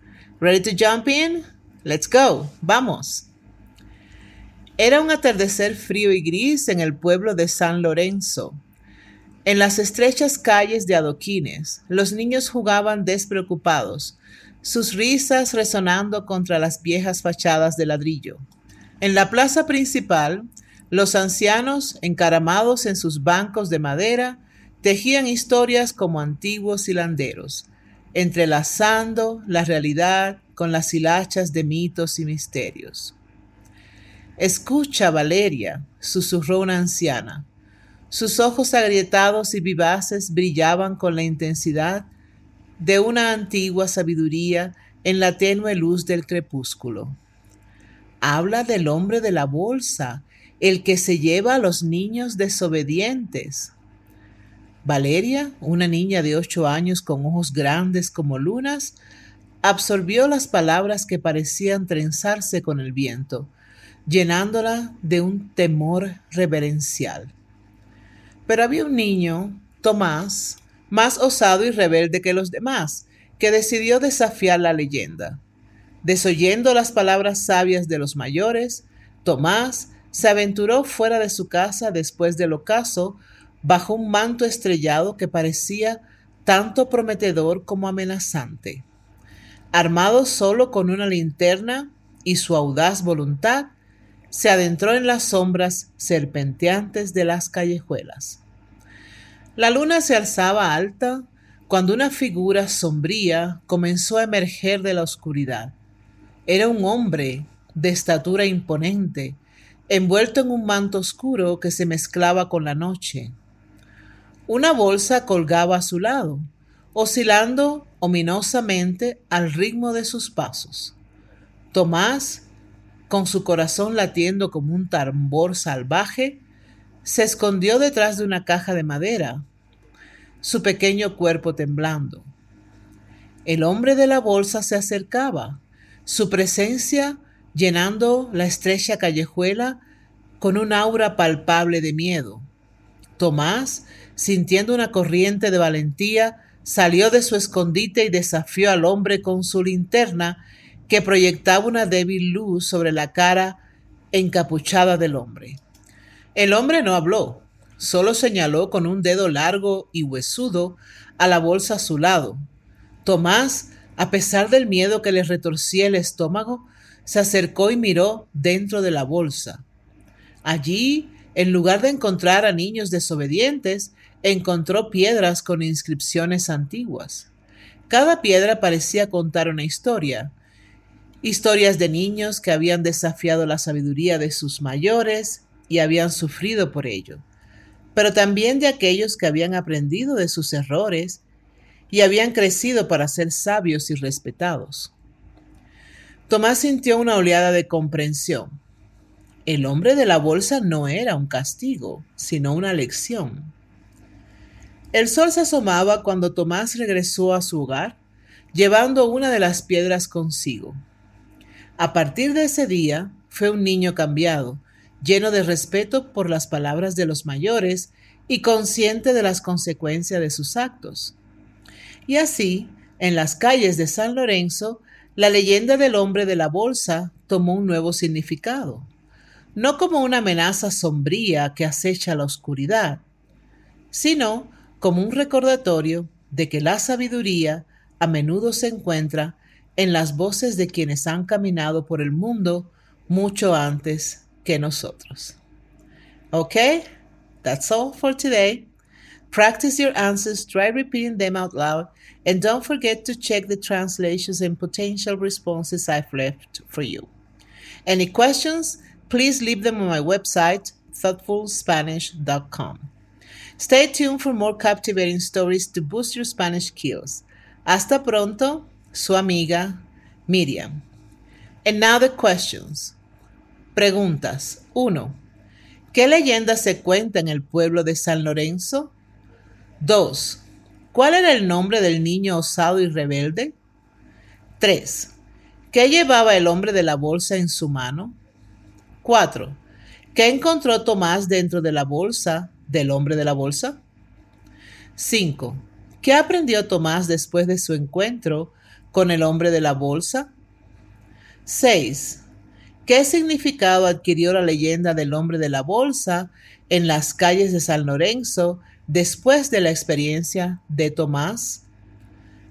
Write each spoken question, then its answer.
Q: ¿Qué leyenda se cuenta en el pueblo de San Lorenzo?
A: En el pueblo de San Lorenzo se cuenta la leyenda del hombre de la bolsa.

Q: ¿Cuál era el nombre del niño osado y rebelde?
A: El nombre del niño osado y rebelde era Tomás.

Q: ¿Qué encontró Tomás dentro de la bolsa del hombre de la bolsa?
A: Dentro de la bolsa del hombre de la bolsa, Tomás encontró piedras con inscripciones antiguas.

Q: ¿Qué aprendió Tomás después de su encuentro con el hombre de la bolsa?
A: Tomás aprendió que el hombre de la bolsa no era un castigo, sino una lección sobre las consecuencias de la desobediencia.

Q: ¿Qué significado adquirió la leyenda del hombre de la bolsa en las calles de San Lorenzo después de la experiencia de Tomás?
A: La leyenda del hombre de la bolsa adquirió un nuevo significado en las calles de San Lorenzo después de la experiencia de Tomás.